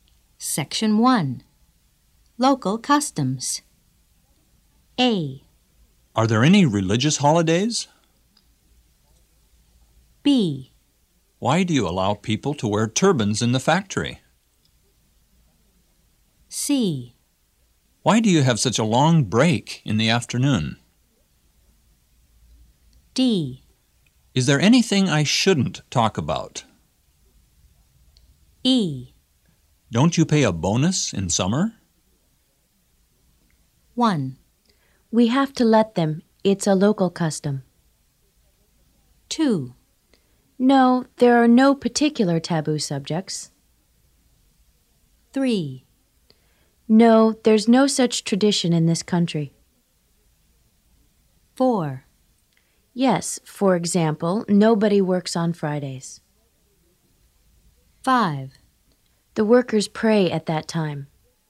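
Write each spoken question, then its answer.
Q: We have to let them. It's a local custom.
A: B: Why do you allow people to wear turbans in the factory?

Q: No, there are no particular taboo subjects.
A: D: Is there anything I shouldn't talk about?

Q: No, there's no such tradition in this country.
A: E: Don't you pay a bonus in summer?

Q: Yes, for example, nobody works on Fridays.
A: A: Are there any religious holidays?

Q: The workers pray at that time.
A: C: Why do you have such a long break in the afternoon?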